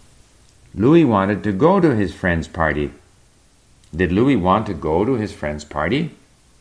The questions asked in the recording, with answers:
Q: Did Louis want to go to his friend's party?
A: Yes, Louis wanted to go to his friend's party.